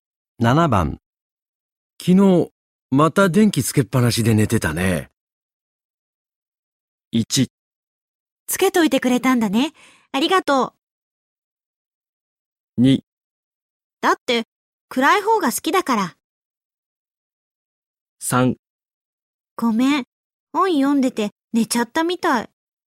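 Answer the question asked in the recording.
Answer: 3: ごめん。本読んでて寝ちゃったみたい。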